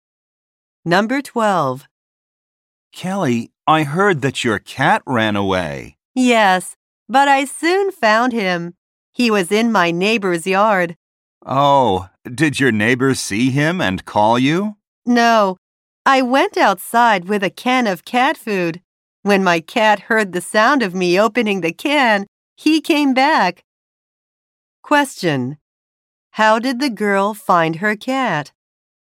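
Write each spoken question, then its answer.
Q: How did the girl find her cat?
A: She opened a can of cat food and he came back.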